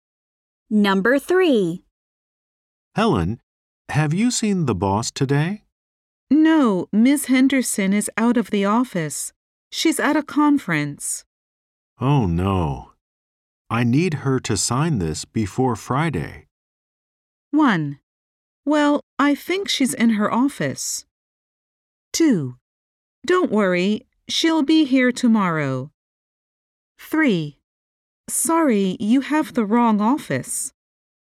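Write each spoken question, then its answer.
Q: Oh, no. I need her to sign this before Friday.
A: 2: Don't worry, she'll be here tomorrow.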